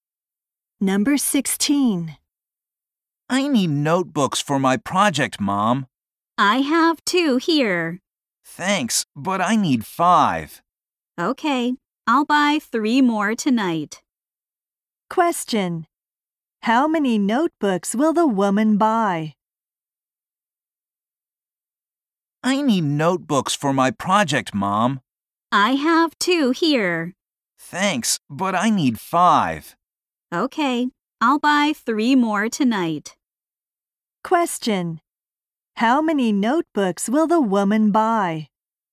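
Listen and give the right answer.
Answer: Three.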